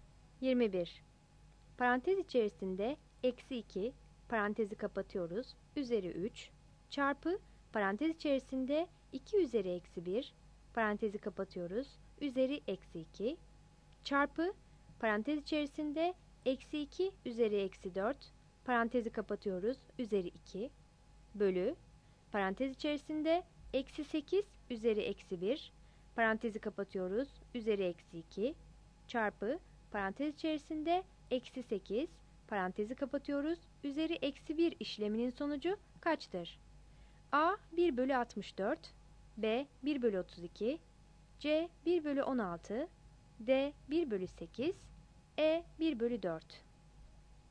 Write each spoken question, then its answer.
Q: Parantez içerisinde eksi 2, parantezi kapatıyoruz, üzeri 3, çarpı parantez içerisinde 2 üzeri eksi 1, parantezi kapatıyoruz, üzeri eksi 2, çarpı parantez içerisinde eksi 2 üzeri eksi 4, parantezi kapatıyoruz, üzeri 2, bölü parantez içerisinde eksi 8 üzeri eksi 1, parantezi kapatıyoruz, üzeri eksi 2, çarpı parantez içerisinde eksi 8, parantezi kapatıyoruz, üzeri eksi 1 işleminin sonucu kaçtır?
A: 21 A